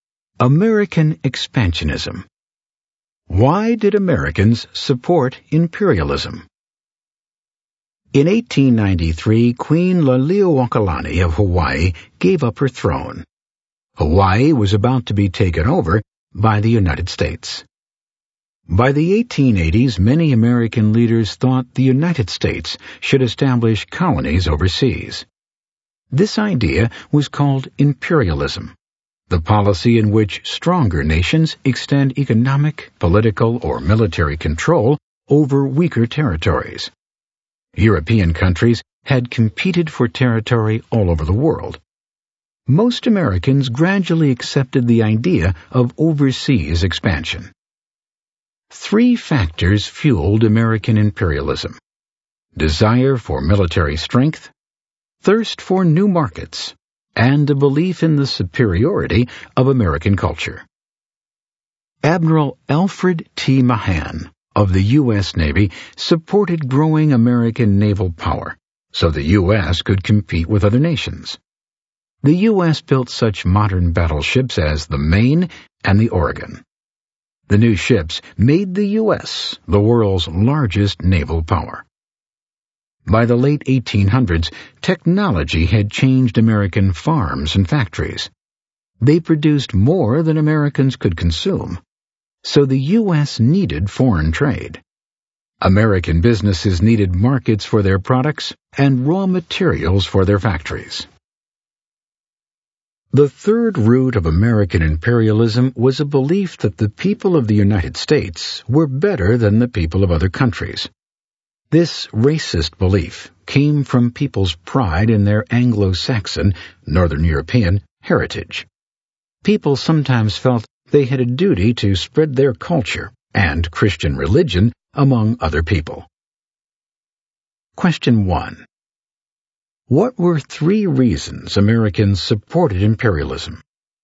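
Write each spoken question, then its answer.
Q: What were three reasons Americans supported imperialism?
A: Desire for military strength, thirst for new markets, and belief in the superiority of American culture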